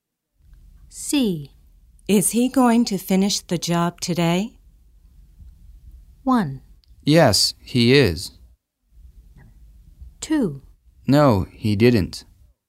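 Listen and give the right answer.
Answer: 1: Yes, he is.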